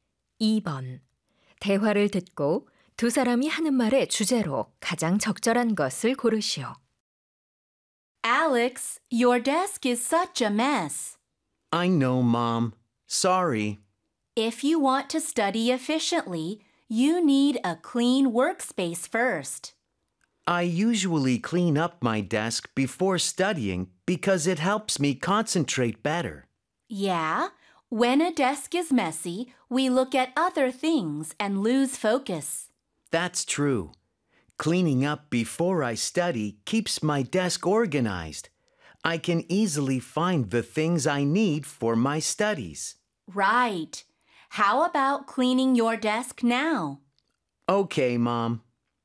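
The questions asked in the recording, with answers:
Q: 대화를 듣고 두 사람이 하는 말의 주제로 가장 적절한 것을 고르시오.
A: 공부 전 책상 정리의 중요성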